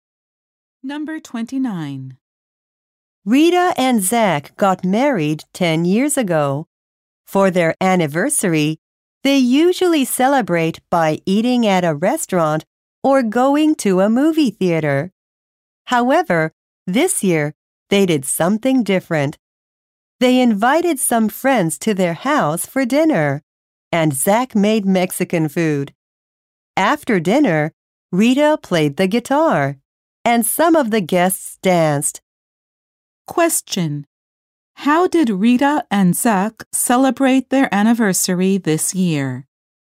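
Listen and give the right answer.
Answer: They had friends over for dinner at home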